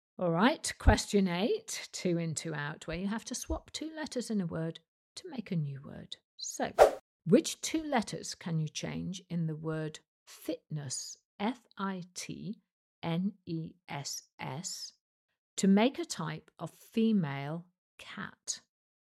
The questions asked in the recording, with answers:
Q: So, which two letters can you change in the word fitness,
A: Well, change the F to an L and the T to an O, and you get a lioness.